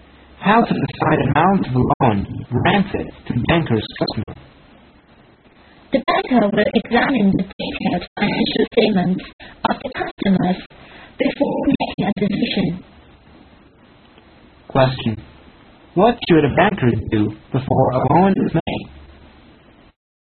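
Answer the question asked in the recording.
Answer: Examine the customer's detailed financial statements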